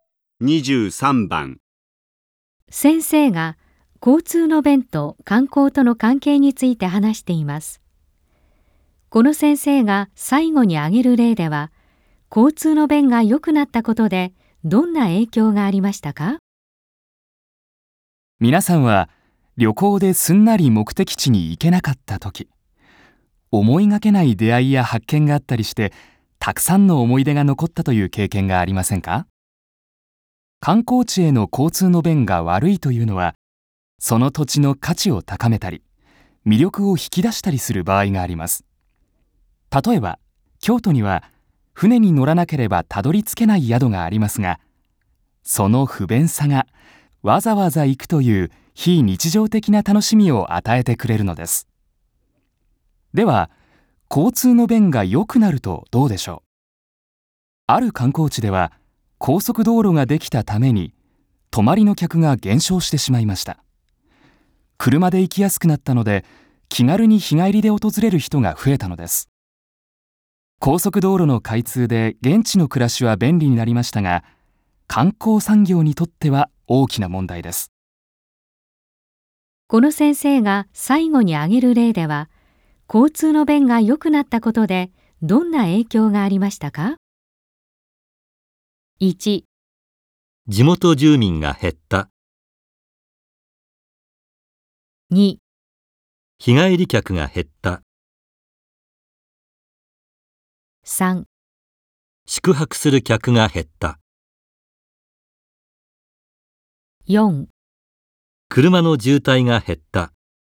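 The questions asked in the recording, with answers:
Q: この先生が最後に挙げる例では、交通の便が良くなったことでどんな影響がありましたか?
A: 3: 宿泊する客が減った。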